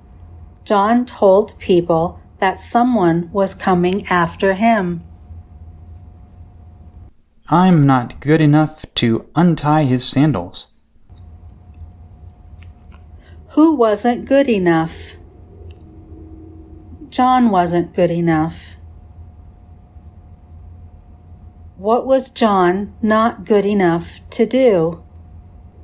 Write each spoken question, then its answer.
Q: What was John not good enough to do?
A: John wasn't good enough to untie his sandals.